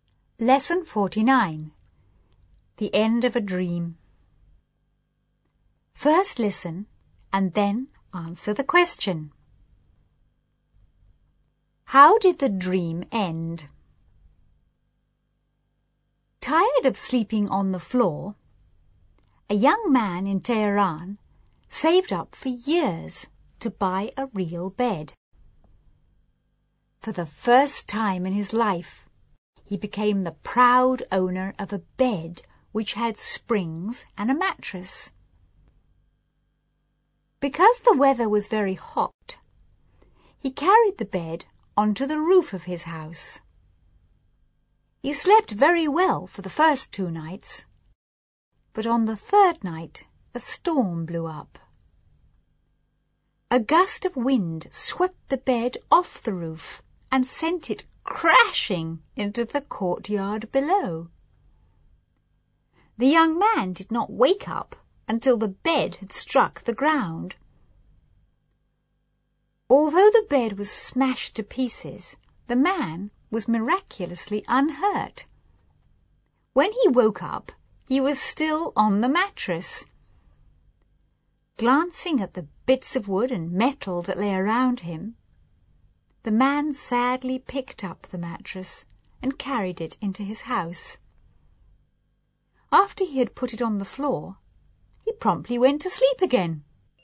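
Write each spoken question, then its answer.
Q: How did the dream end?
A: The bed was blown off the roof and smashed, so he went back to sleeping on the mattress on the floor.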